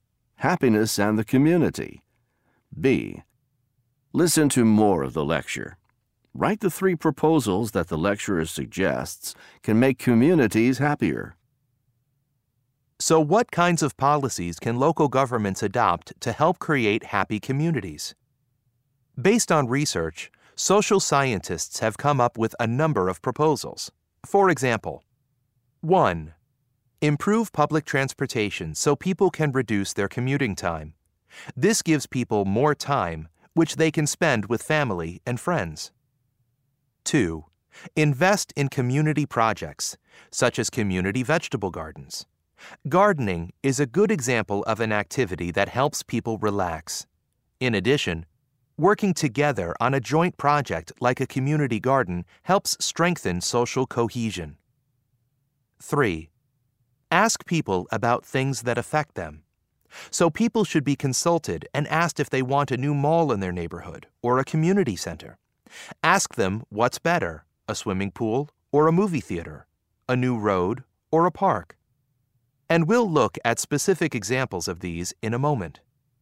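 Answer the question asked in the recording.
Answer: Improve public transportation to reduce commuting time; invest in community projects such as community vegetable gardens; ask (consult) people about things that affect them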